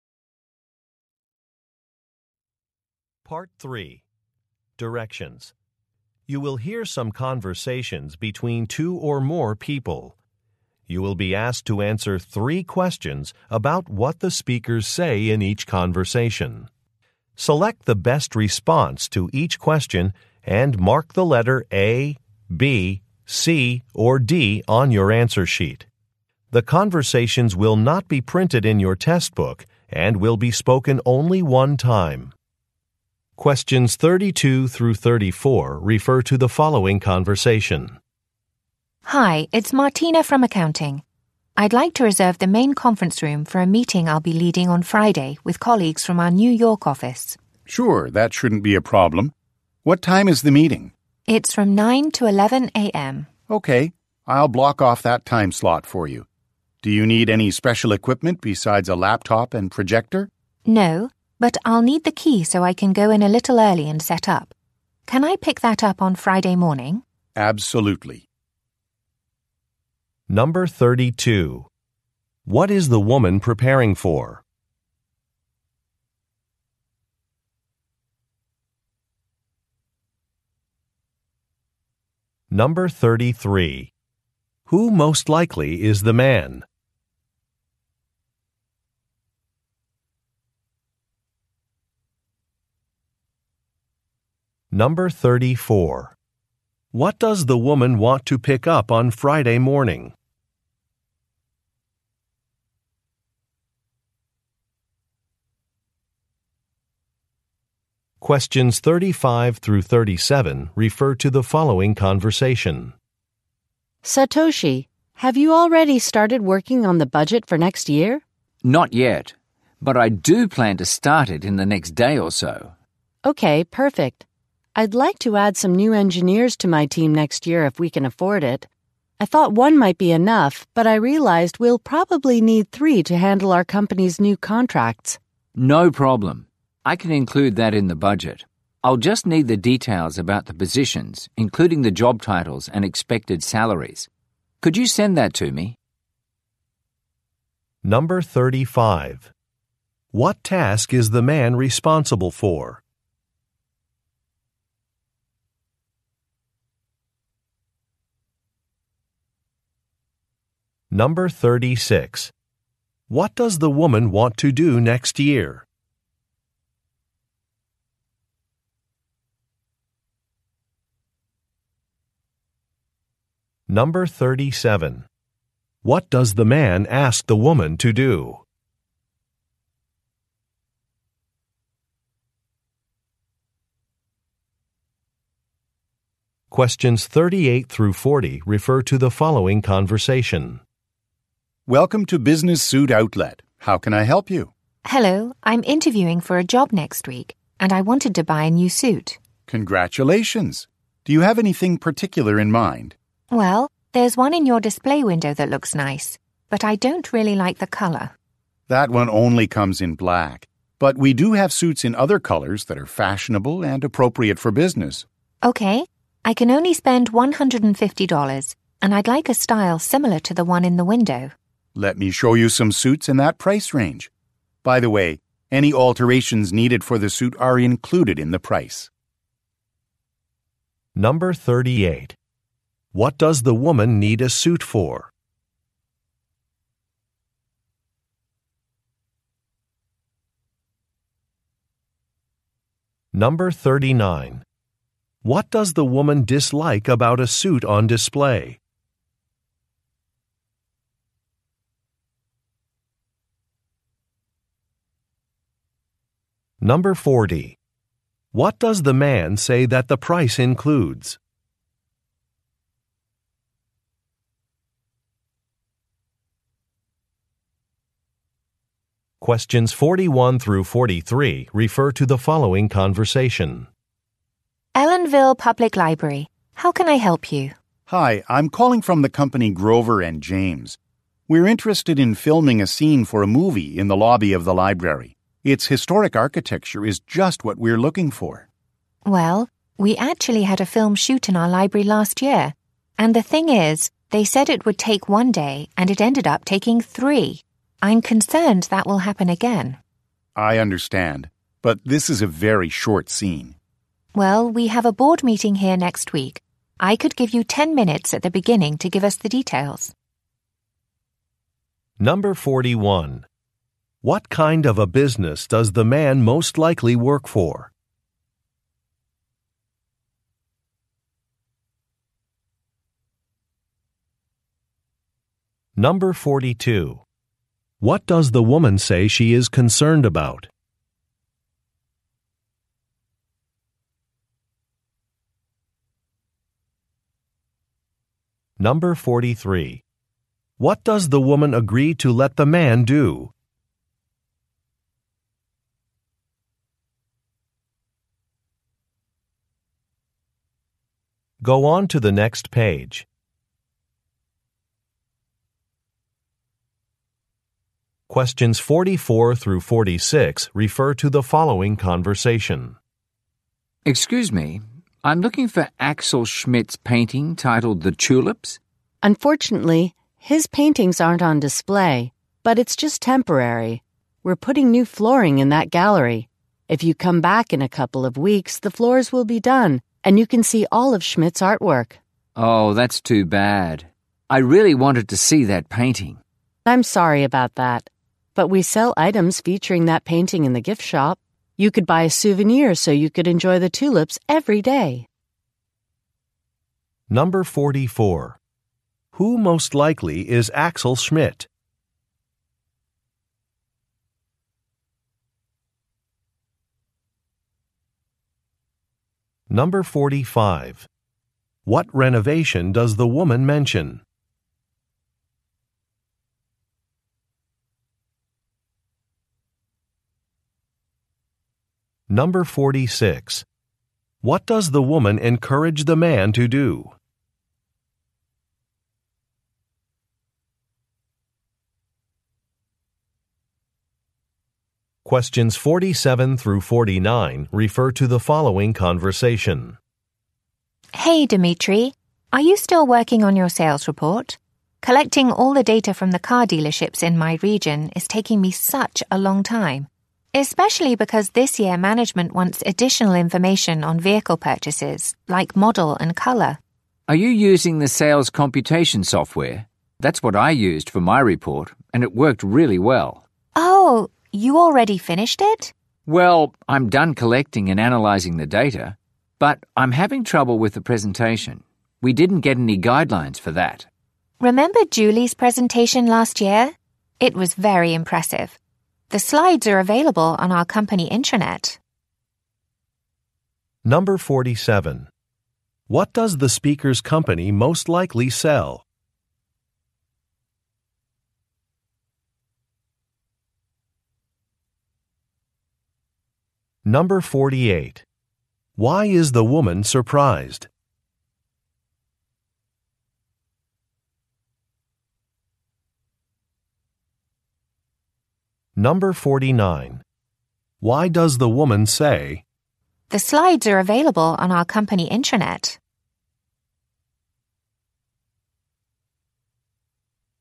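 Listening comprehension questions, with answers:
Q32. What is the woman preparing for?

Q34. What does the woman want to pick up on Friday morning?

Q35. What task is the man responsible for?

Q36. What does the woman want to do next year?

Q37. What does the man ask the woman to do?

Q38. What does the woman need a suit for?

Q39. What does the woman dislike about a suit on display?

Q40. What does the man say that the price includes?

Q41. What kind of a business does the man most likely work for?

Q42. What does the woman say she is concerned about?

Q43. What does the woman agree to let the man do?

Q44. Who most likely is Axel Schmidt?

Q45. What renovation does the woman mention?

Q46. What does the woman encourage the man to do?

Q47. What does the speakers' company most likely sell?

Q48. Why is the woman surprised?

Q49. Why does the woman say, "The slides are available on our company intranet"?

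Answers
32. A meeting on Friday with colleagues from the New York office
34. The key to the conference room
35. Preparing next year's budget
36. Hire new engineers for her team
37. Send details about the positions
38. A job interview
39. The color
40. Alterations
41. A film production company
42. The filming taking longer than planned
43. Present details at a board meeting
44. A painter
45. New flooring in a gallery
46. Buy a souvenir in the gift shop
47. Cars
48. The man has already finished his report
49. To suggest using Julie's presentation as a model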